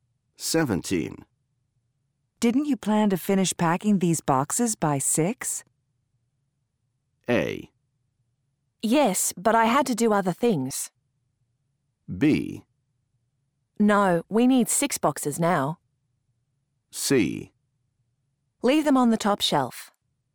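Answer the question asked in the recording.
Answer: A: Yes, but I had to do other things.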